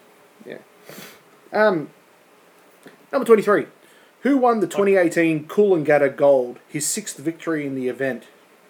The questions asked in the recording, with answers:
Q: Who won the 2018 Coolangatta Gold, his sixth victory in the event?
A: Ali Day.